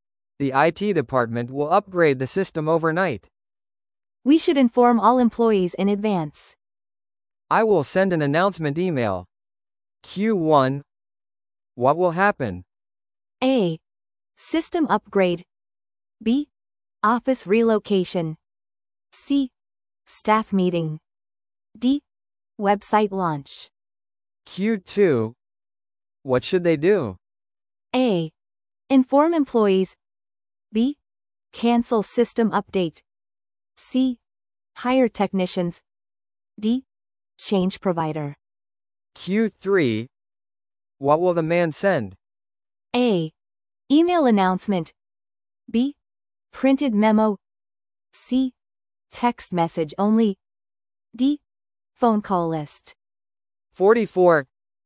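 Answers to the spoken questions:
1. A: System upgrade.
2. A: Inform employees.
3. A: Email announcement.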